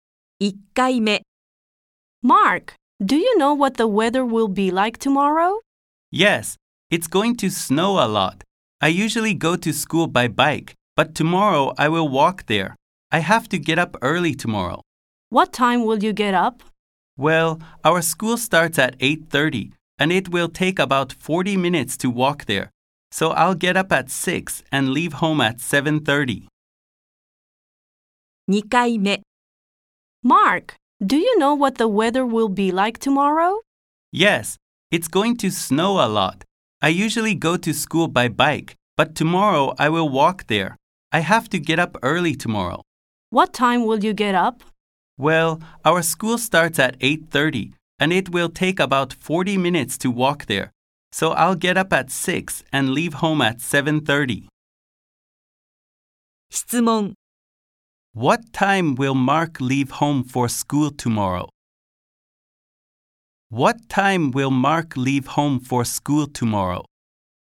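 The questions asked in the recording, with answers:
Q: What time will Mark leave home for school tomorrow?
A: At 7:30.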